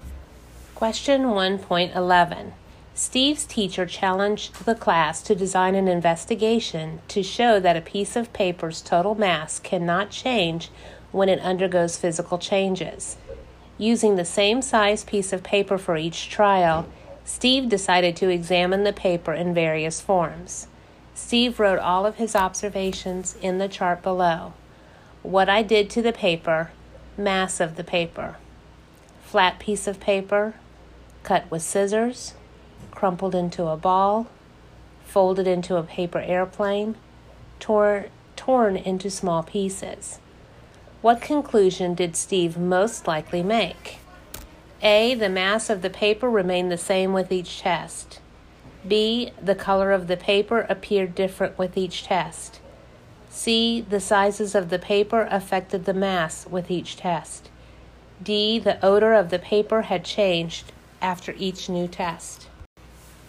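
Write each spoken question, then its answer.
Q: What conclusion did Steve most likely make?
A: A: The mass of the paper remained the same with each test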